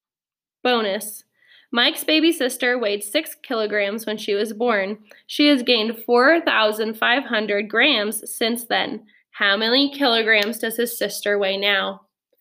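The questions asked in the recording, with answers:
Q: How many kilograms does his sister weigh now?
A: 10.5 kilograms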